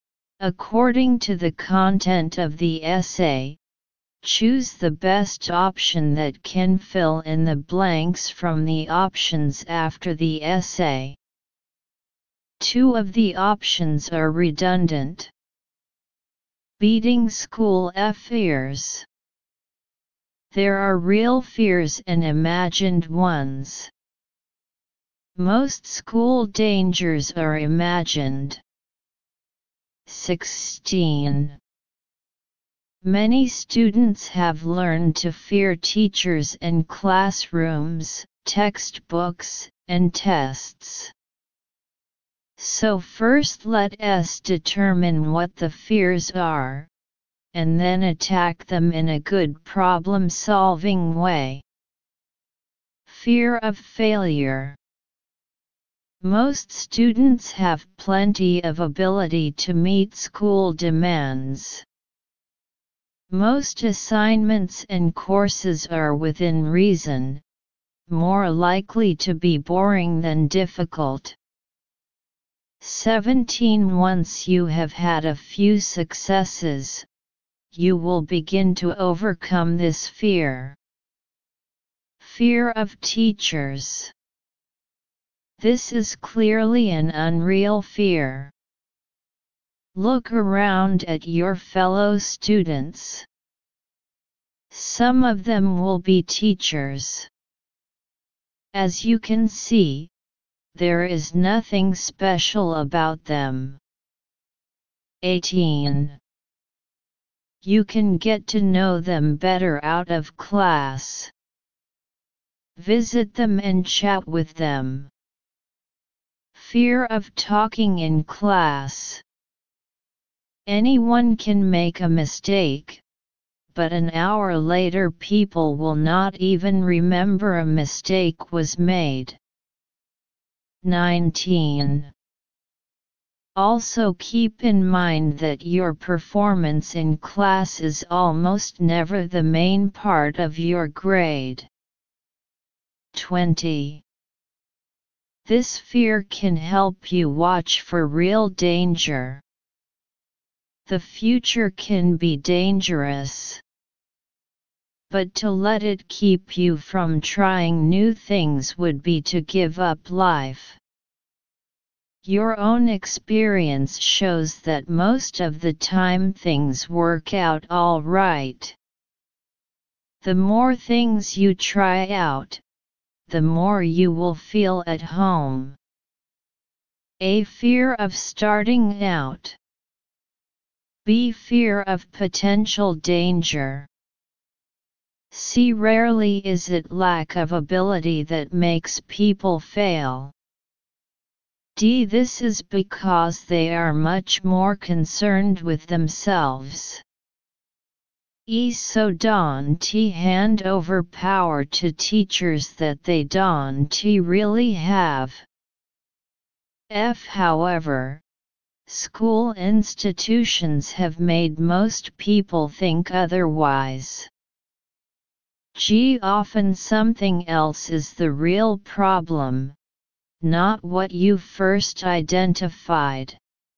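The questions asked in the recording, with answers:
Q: 16. Many students have learned to fear teachers and classrooms, textbooks, and tests.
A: F: However, school institutions have made most people think otherwise.

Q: 17. Once you have had a few successes, you will begin to overcome this fear.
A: C: Rarely is it lack of ability that makes people fail.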